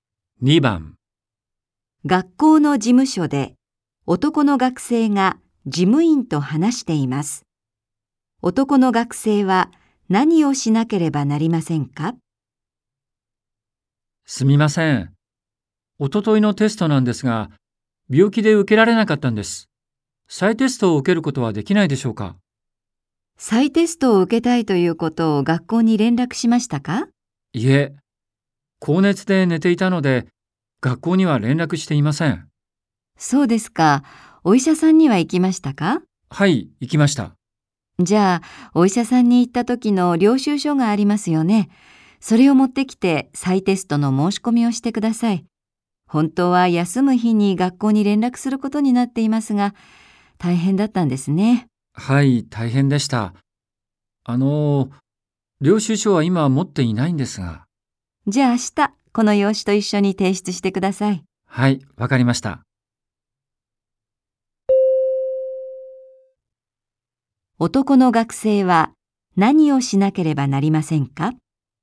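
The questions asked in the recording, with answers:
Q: 男の学生は何をしなければなりませんか?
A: 明日、医者の領収書を用紙と一緒に提出して再テストを申し込む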